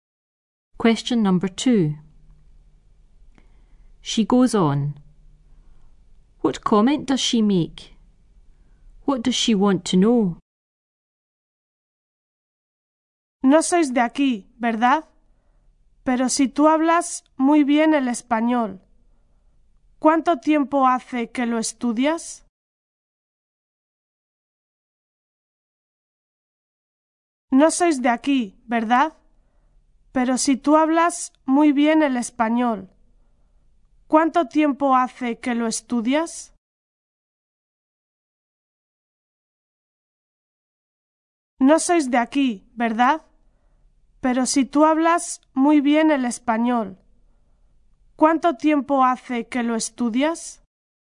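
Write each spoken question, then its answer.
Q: What comment does she make?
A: You speak Spanish very well

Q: What does she want to know?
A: How long you have been studying Spanish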